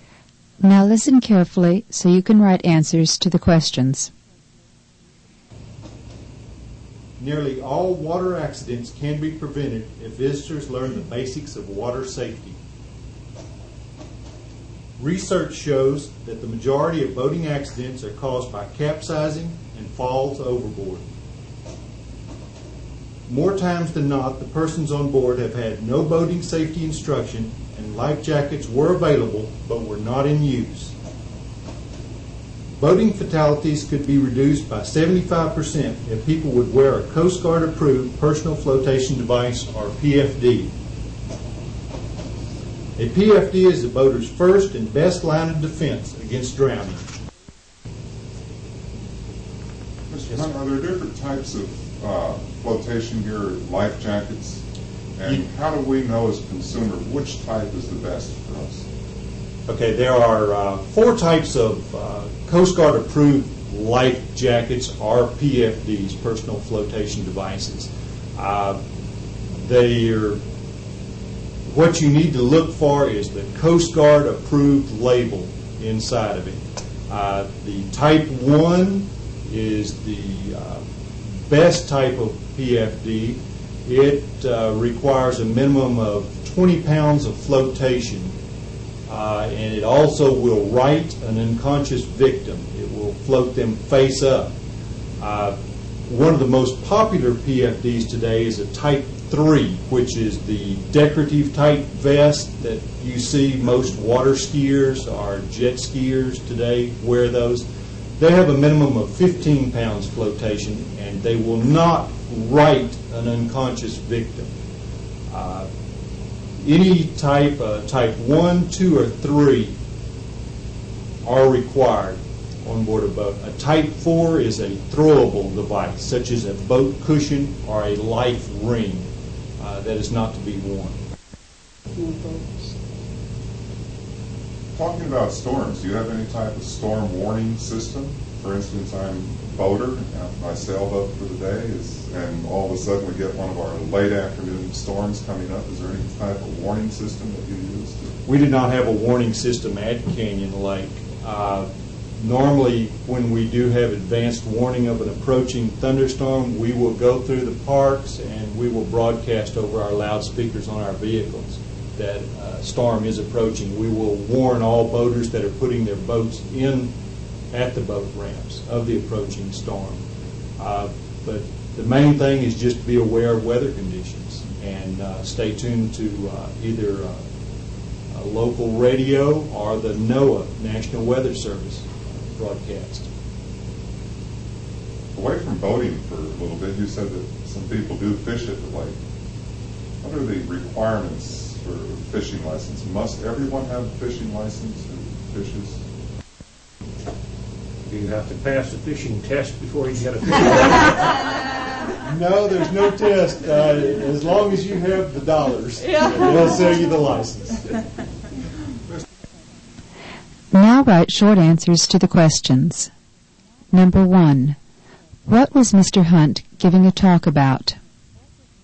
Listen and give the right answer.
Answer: The answer is water or boating safety.